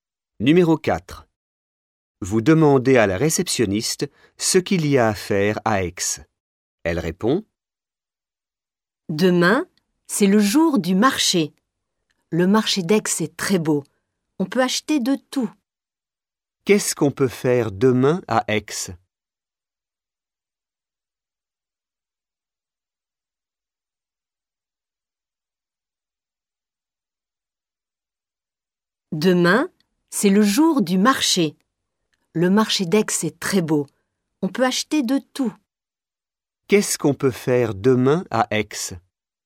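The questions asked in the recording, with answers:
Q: Qu'est-ce qu'on peut faire demain à Aix?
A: Aller au marché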